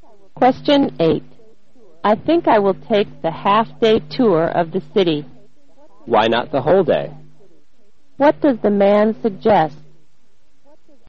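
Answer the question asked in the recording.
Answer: The woman should take the whole-day tour.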